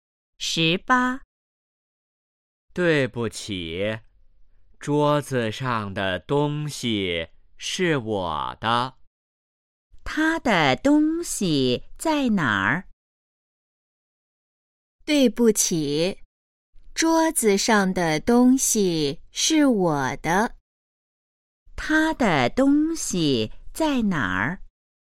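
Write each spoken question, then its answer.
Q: 他的东西在哪儿?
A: 桌子上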